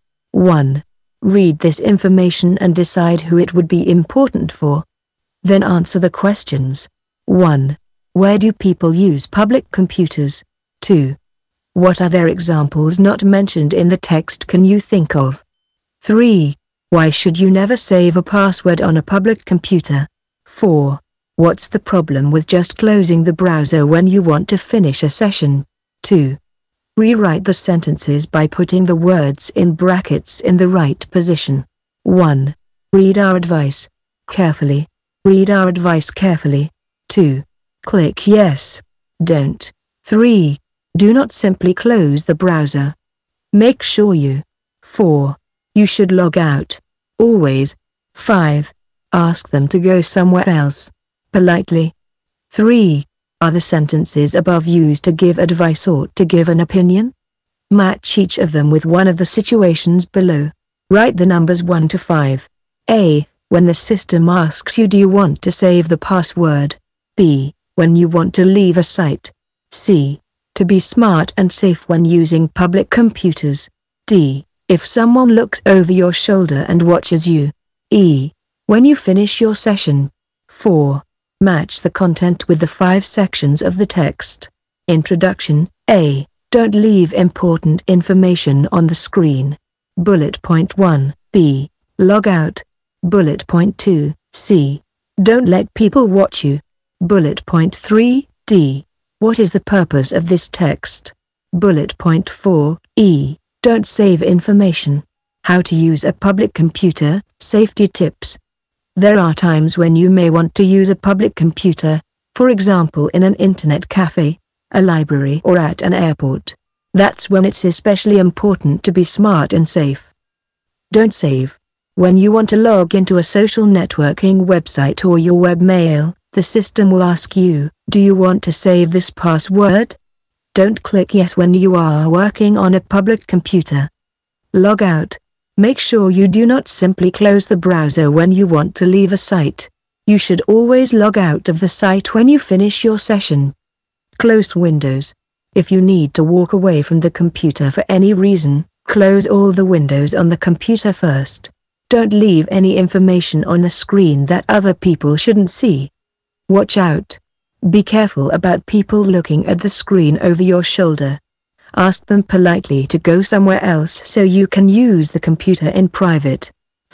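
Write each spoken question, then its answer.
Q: Where do people use public computers?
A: In an internet cafe, a library or at an airport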